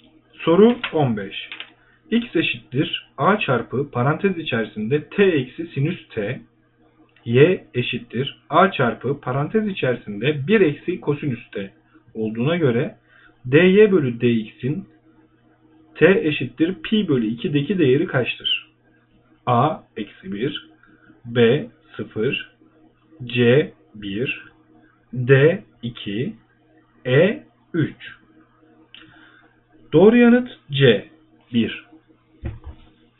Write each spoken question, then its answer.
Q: X eşittir A çarpı parantez içerisinde T eksi sinüs T, Y eşittir A çarpı parantez içerisinde 1 eksi kosinüs T olduğuna göre dy bölü dx'in T eşittir pi bölü 2'deki değeri kaçtır?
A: Doğru yanıt C 1.